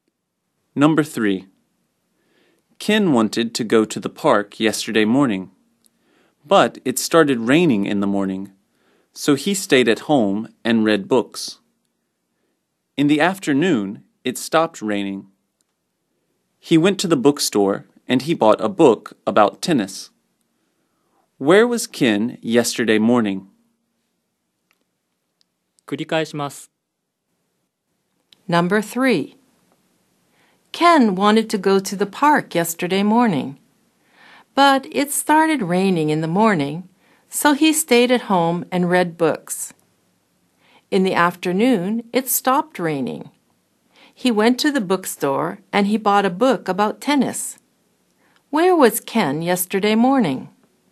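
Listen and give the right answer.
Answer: He was at home.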